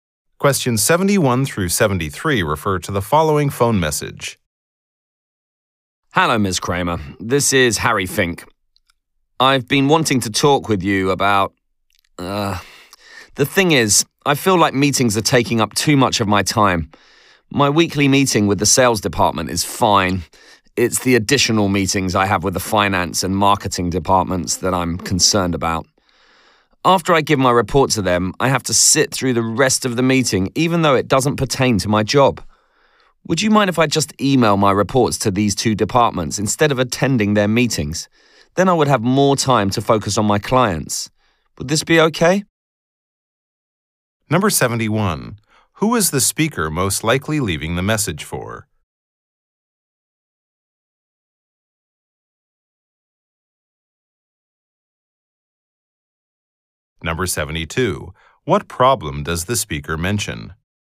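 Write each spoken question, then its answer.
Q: What problem does the speaker mention?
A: Meetings take up too much of his time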